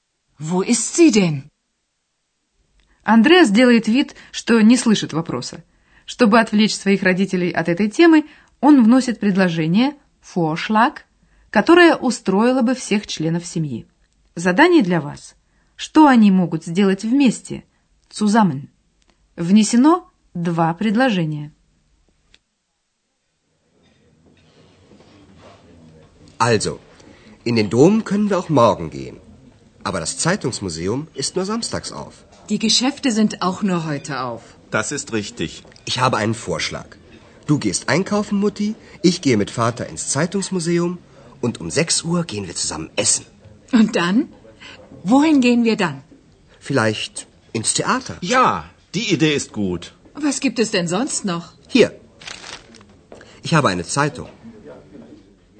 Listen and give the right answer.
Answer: Андреас предлагает вечером в 6 часов пойти вместе поесть, а потом в театр.